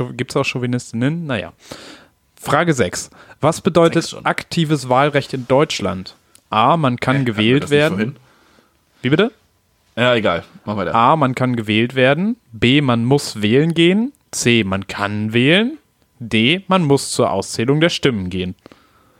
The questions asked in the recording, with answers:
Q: Was bedeutet aktives Wahlrecht in Deutschland?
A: Und aktives ist, man kann wählen.